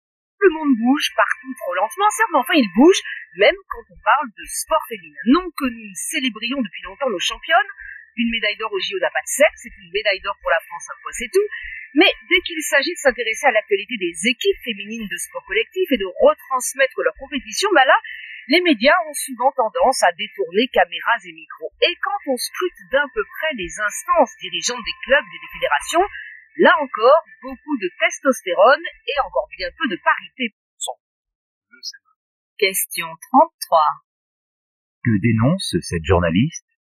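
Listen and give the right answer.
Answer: Le manque de couverture médiatique des équipes féminines de sport collectif et le manque de parité dans les instances dirigeantes des clubs et des fédérations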